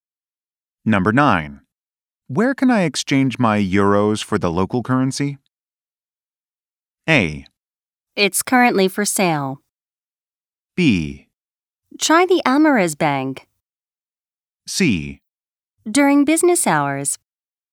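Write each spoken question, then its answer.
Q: Where can I exchange my euros for the local currency?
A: B: Try the Amaris Bank.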